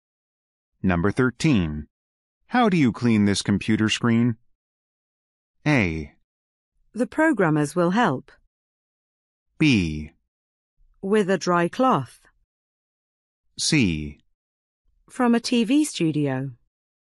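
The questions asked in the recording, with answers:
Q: How do you clean this computer screen?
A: B: With a dry cloth.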